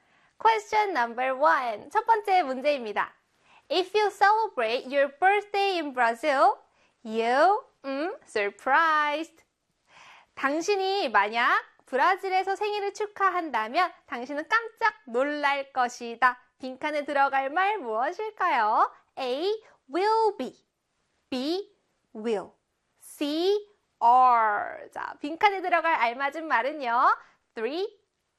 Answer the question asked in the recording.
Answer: 정답은요? 그렇죠. A의 will be입니다.